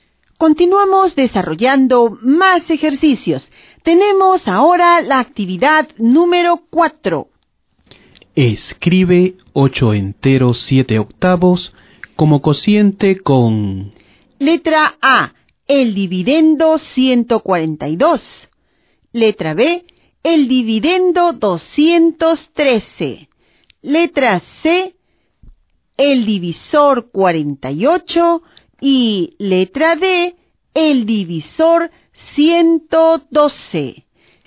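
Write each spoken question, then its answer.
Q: Escribe 8 enteros 7 octavos como cociente con... Letra A, el dividendo 142.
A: 142 : 16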